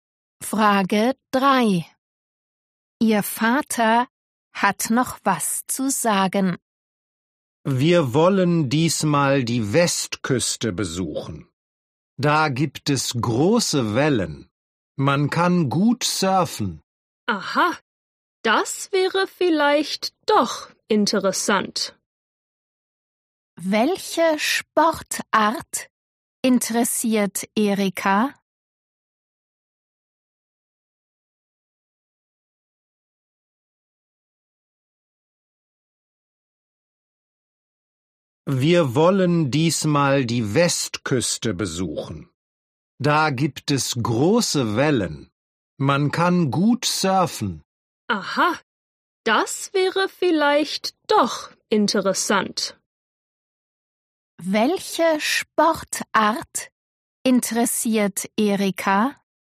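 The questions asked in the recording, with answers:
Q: Welche Sportart interessiert Erika?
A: Surfen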